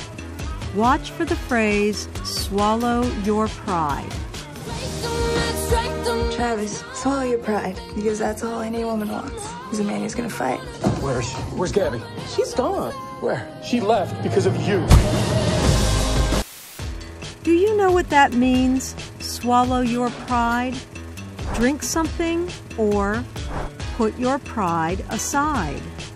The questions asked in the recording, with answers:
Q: Do you know what that means, swallow your pride?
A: Swallow your pride means to put your pride aside.